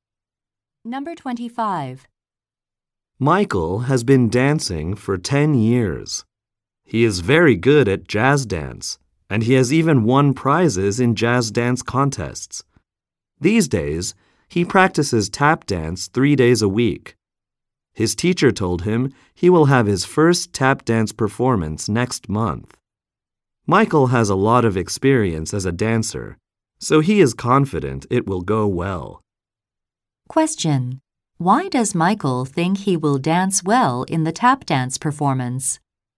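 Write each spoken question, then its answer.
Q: Why does Michael think he will dance well in the tap dance performance?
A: He has a lot of experience as a dancer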